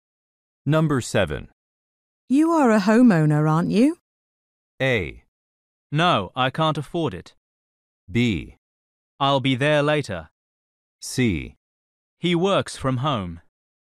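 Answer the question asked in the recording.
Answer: A: No, I can't afford it.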